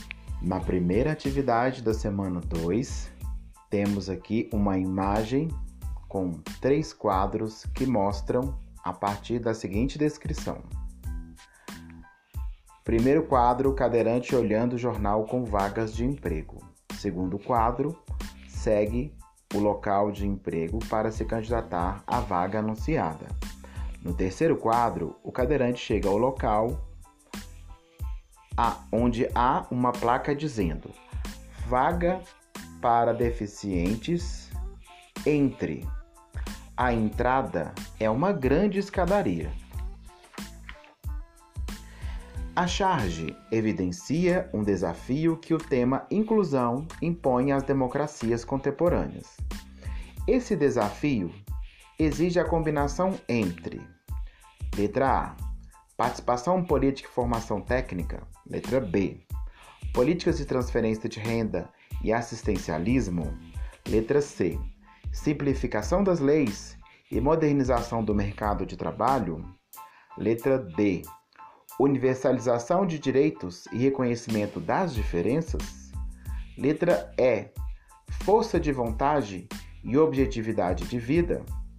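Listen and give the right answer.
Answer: D: universalização de direitos e reconhecimento das diferenças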